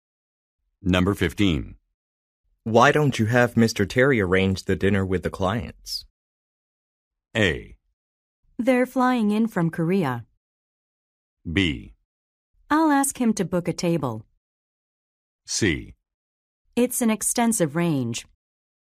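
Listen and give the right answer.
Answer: B: I'll ask him to book a table.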